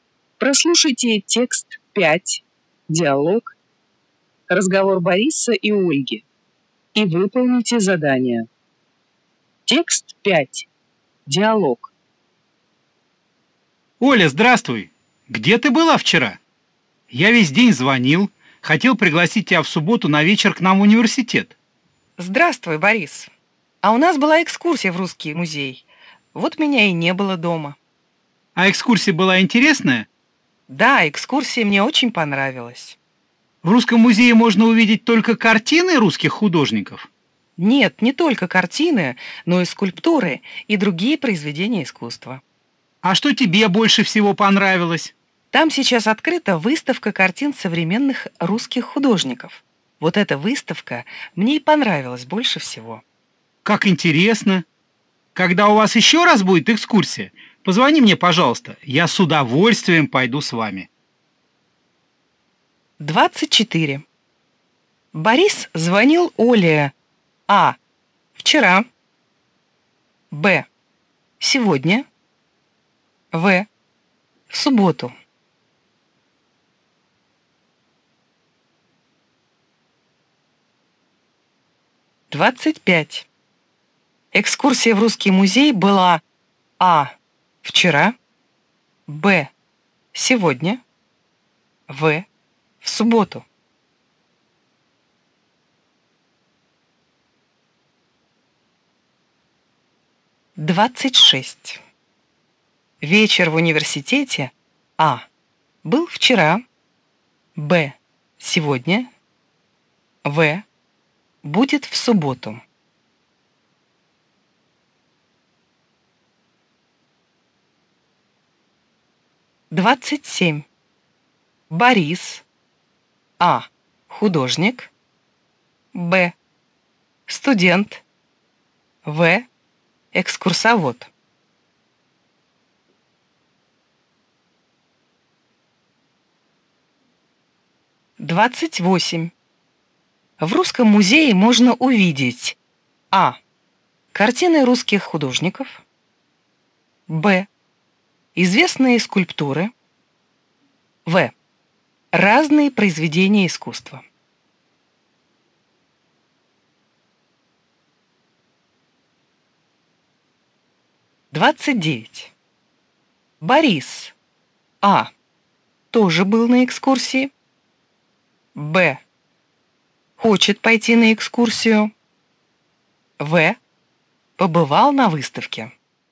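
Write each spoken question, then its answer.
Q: Борис звонил Оле А. вчера, Б. сегодня, В. в субботу.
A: А: вчера

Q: Экскурсия в русский музей была А. вчера, Б. сегодня, В. в субботу.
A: А: вчера

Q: Вечер в университете А. был вчера, Б. сегодня, В. будет в субботу.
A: В: будет в субботу

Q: Борис. А. Художник. Б. Студент. В. Экскурсовод.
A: Б: Студент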